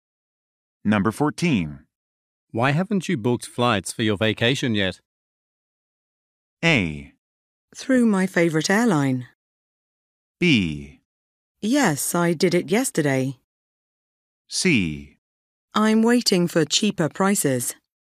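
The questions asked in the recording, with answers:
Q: Why haven't you booked flights for your vacation yet?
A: C: I'm waiting for cheaper prices.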